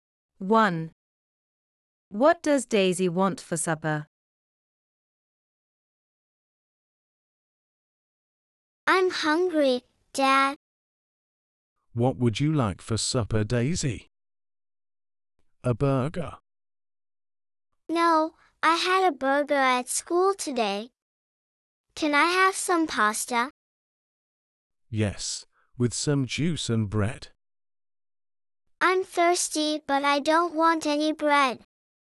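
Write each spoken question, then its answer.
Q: What does Daisy want for supper?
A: pasta and juice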